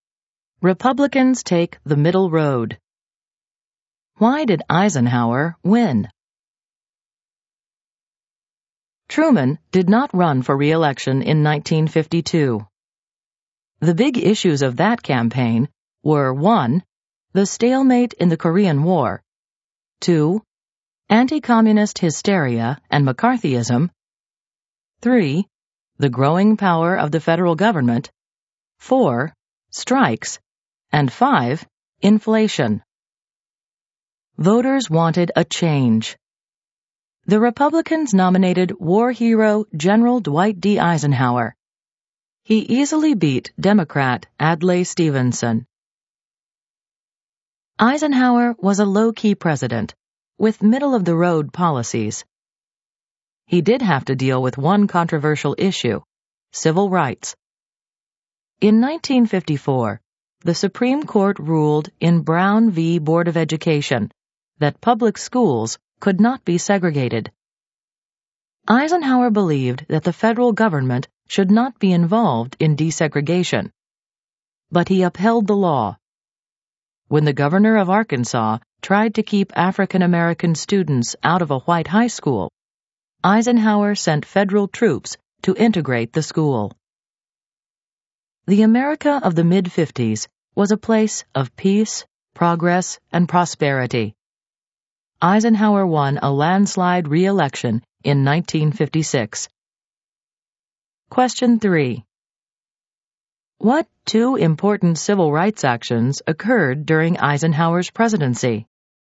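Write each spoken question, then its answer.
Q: What two important civil rights actions occurred during Eisenhower's presidency?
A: Brown v. Board of Education outlawed school segregation, and Eisenhower sent federal troops to integrate an Arkansas high school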